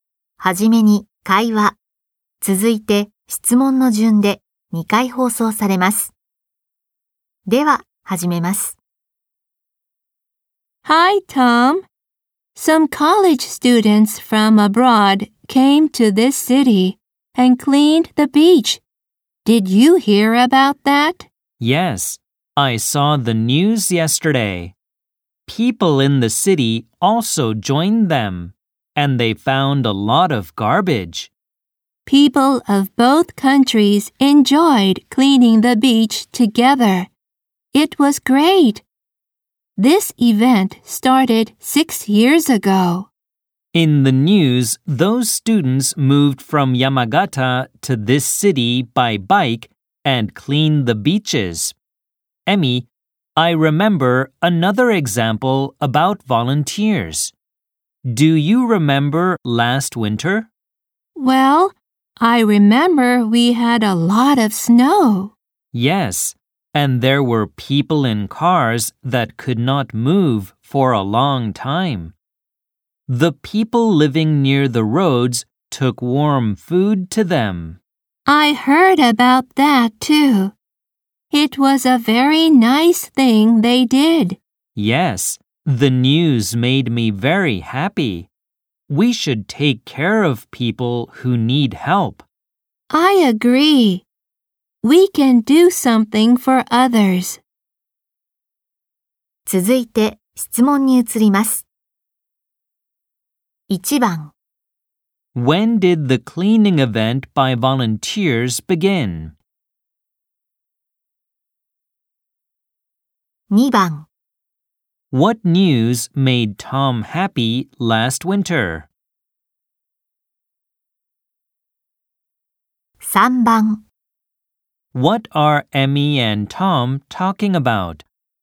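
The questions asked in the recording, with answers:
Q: When did the cleaning event by volunteers begin?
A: 6 years ago

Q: What news made Tom happy last winter?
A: People living near the roads took warm food to people in cars that could not move

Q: What are Emmy and Tom talking about?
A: Volunteers helping others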